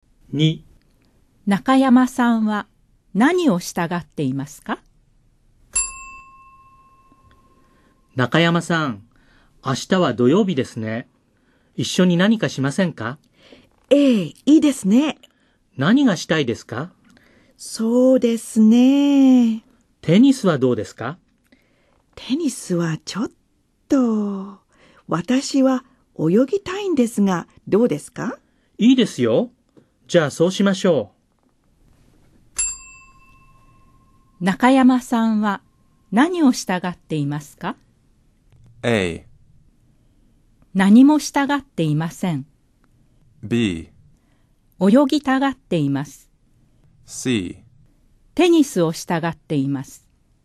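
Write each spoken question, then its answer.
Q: 中山さんは何を従っていますか?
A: B: 泳ぎたがっています。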